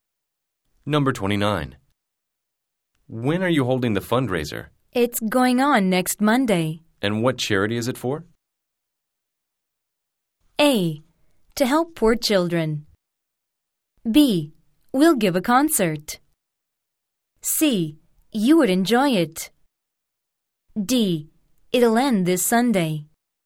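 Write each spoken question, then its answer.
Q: And what charity is it for?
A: A: To help poor children.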